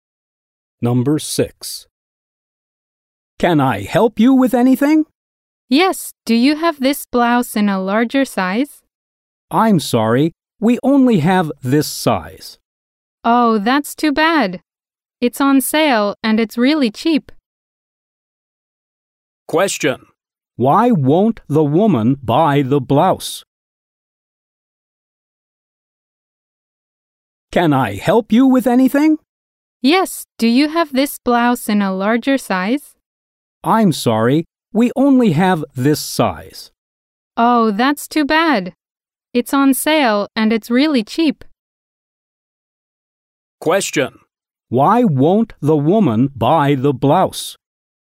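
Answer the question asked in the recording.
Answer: They don't have it in a larger size.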